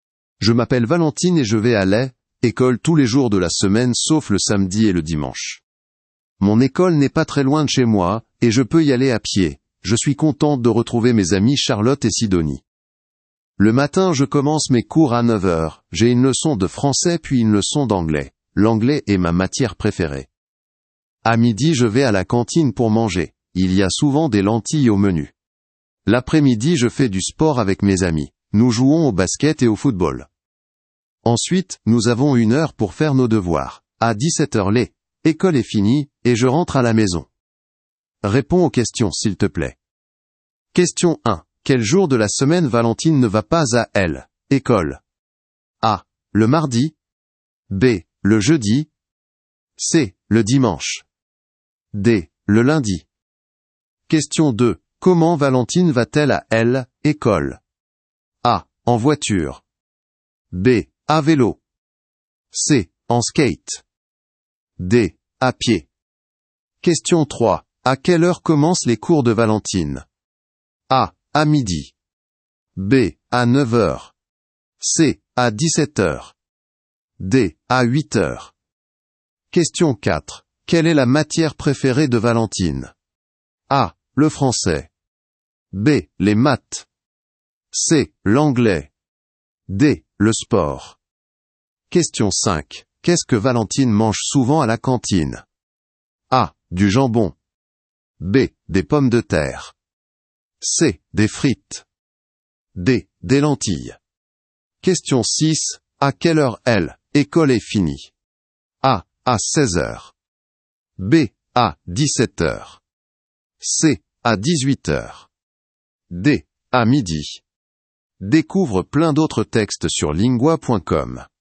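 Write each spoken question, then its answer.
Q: Quel jour de la semaine Valentine ne va pas à l'école?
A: C: Le dimanche

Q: Comment Valentine va-t-elle à l'école?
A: D: À pied

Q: À quelle heure commencent les cours de Valentine?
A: B: À 9h

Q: Quelle est la matière préférée de Valentine?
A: C: L'anglais

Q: Qu'est-ce que Valentine mange souvent à la cantine?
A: D: Des lentilles

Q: À quelle heure l'école est finie?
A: B: À 17h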